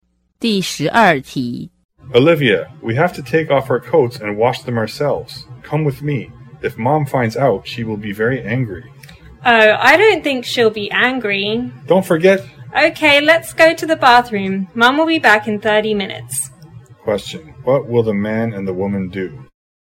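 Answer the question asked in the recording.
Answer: Wash their coats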